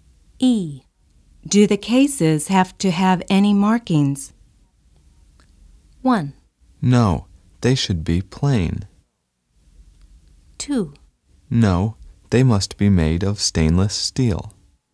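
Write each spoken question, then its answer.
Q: Do the cases have to have any markings?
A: 1: No, they should be plain.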